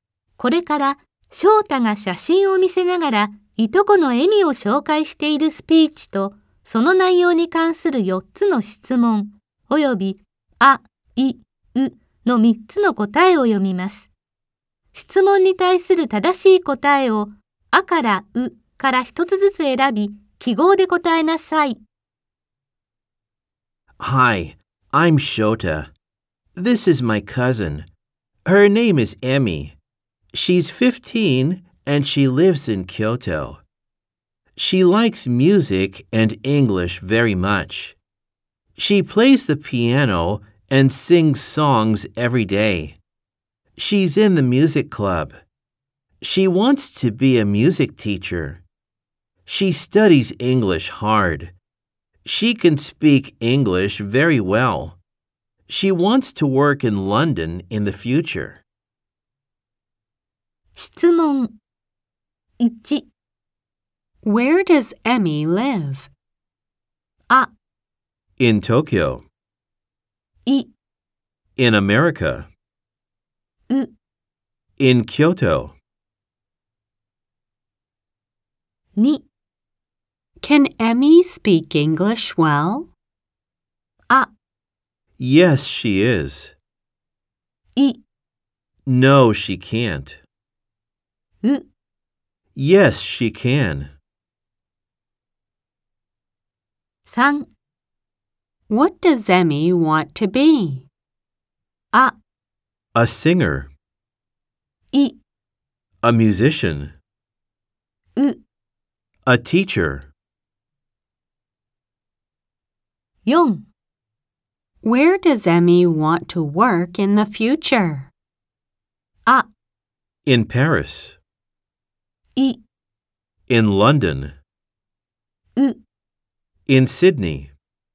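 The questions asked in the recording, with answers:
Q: Where does Emmy live?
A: う: In Kyoto.

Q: Can Emmy speak English well?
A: う: Yes, she can.

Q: Where does Emmy want to work in the future?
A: い: In London.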